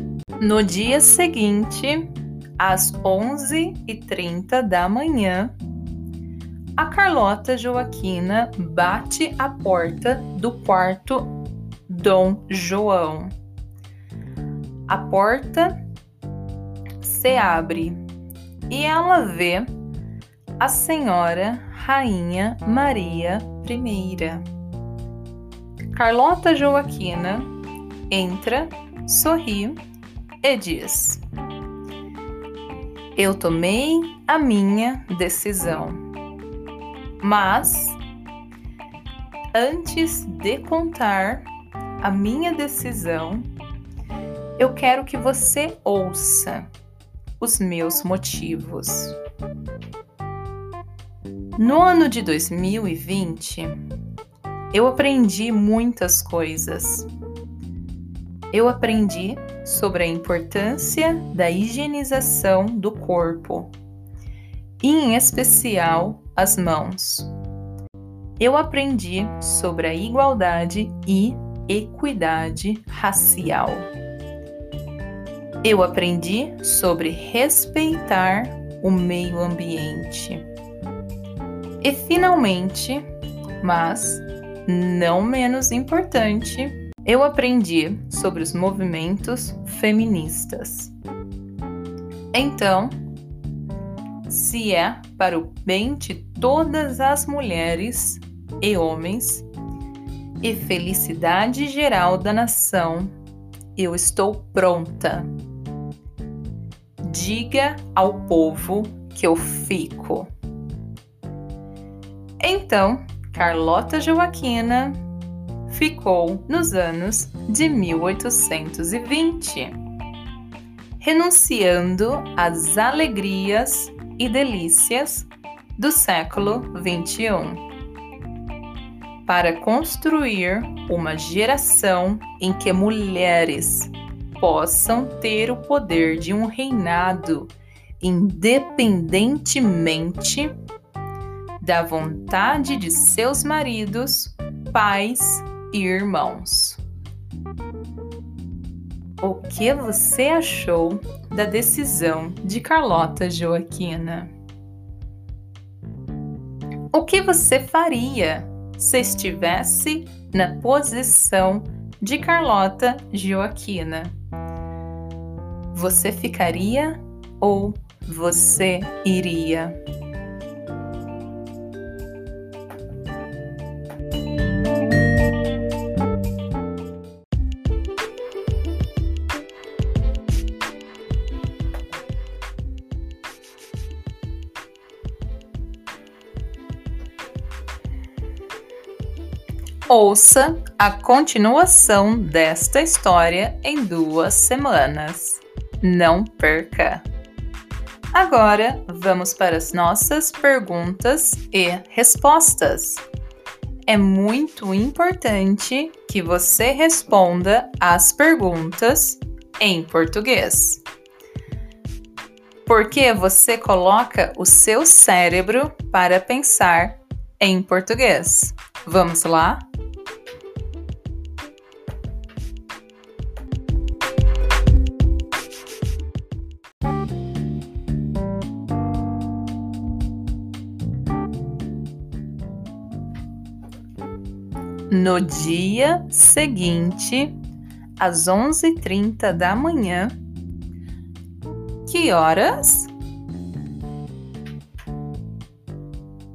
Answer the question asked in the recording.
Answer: Às 11h30 da manhã.